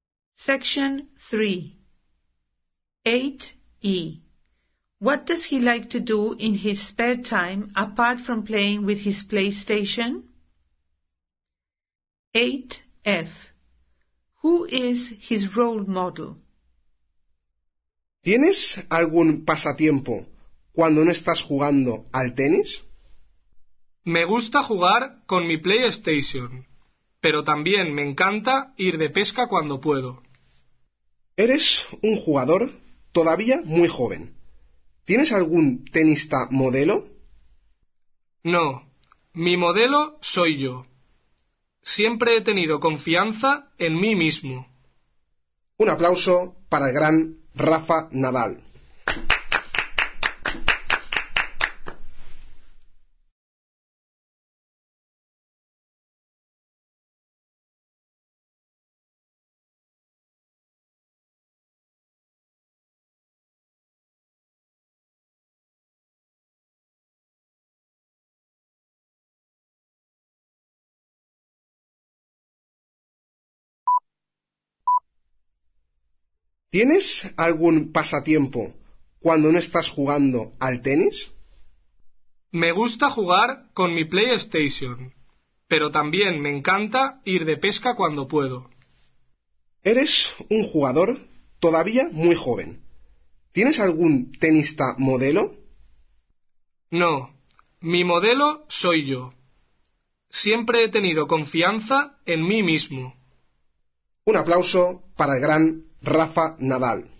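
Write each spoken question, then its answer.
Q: What does he like to do in his spare time apart from playing with his PlayStation?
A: Go fishing

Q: Who is his role model?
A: Himself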